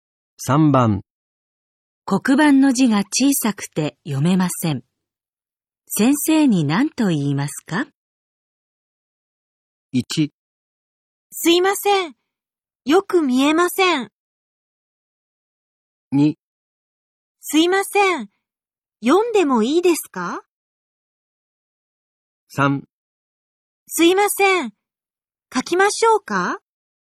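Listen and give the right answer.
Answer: 1: すいません。よく見えません。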